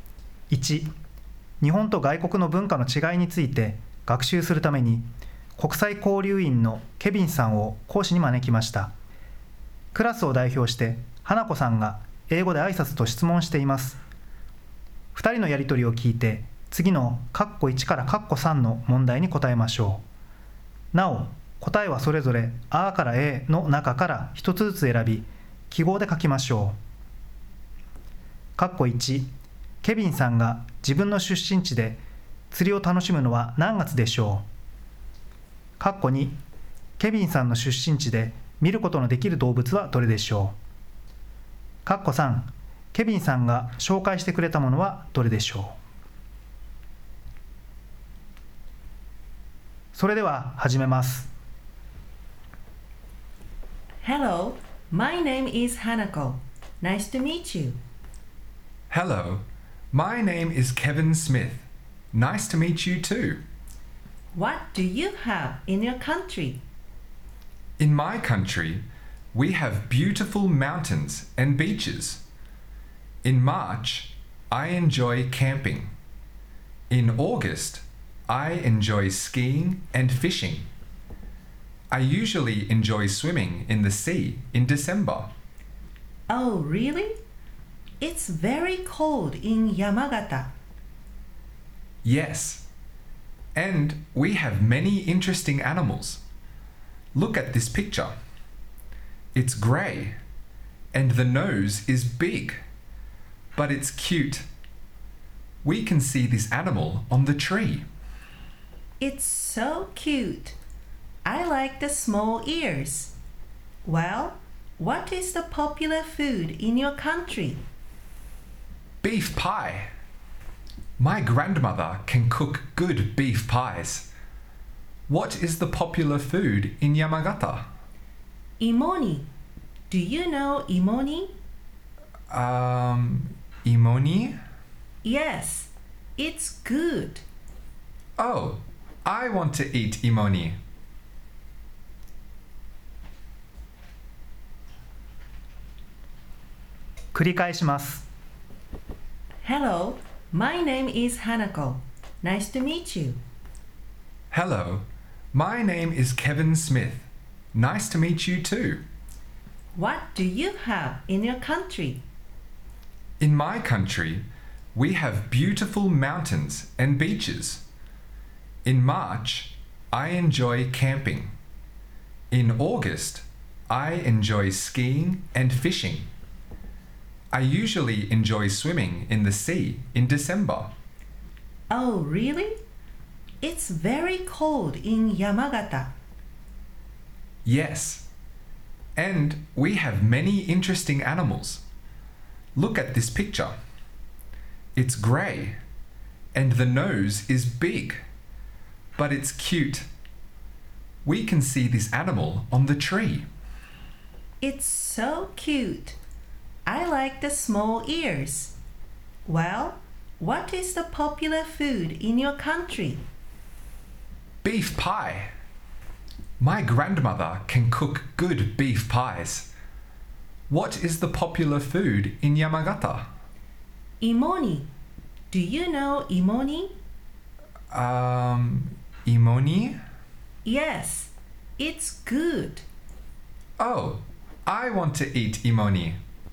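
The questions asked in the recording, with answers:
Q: ケビンさんが自分の出身地で釣りを楽しむのは何月でしょう。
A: 8月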